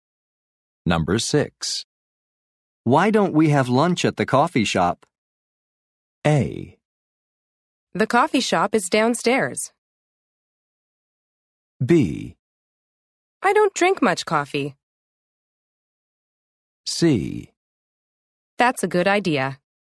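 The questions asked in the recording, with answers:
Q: Why don't we have lunch at the coffee shop?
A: C: That's a good idea.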